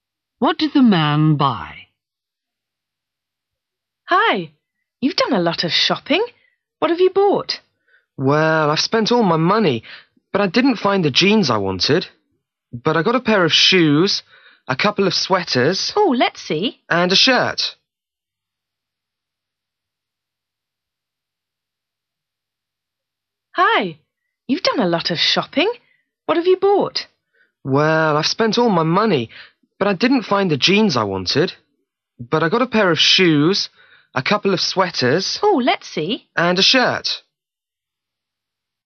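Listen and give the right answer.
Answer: a pair of shoes, a couple of sweaters and a shirt (not jeans)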